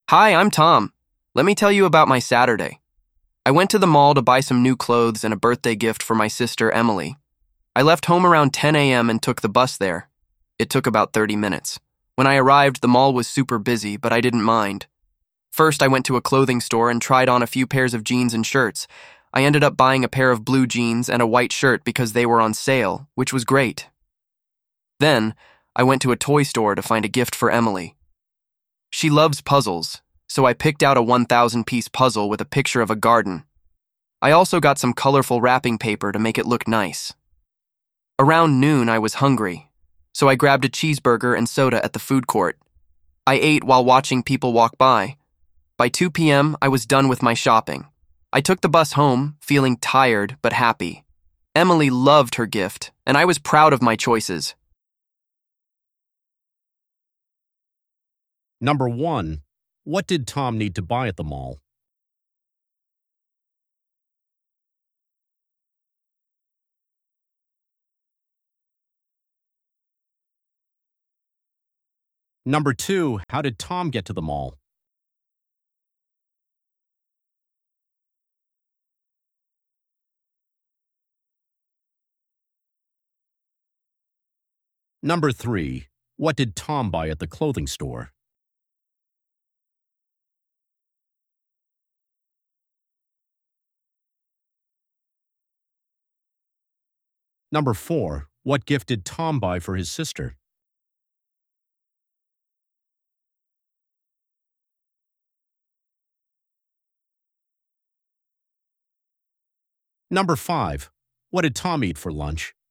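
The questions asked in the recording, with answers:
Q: What did Tom need to buy at the mall?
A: New clothes and a birthday gift for his sister

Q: How did Tom get to the mall?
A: By bus

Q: What did Tom buy at the clothing store?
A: A pair of blue jeans and a white shirt

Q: What gift did Tom buy for his sister?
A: A 1,000-piece puzzle with a picture of a garden

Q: What did Tom eat for lunch?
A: A cheeseburger and soda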